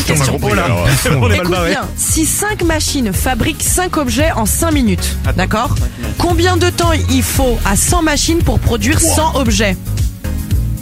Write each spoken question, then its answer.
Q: combien de temps il faut à 100 machines pour produire 100 objets?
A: la bonne réponse bien est 5.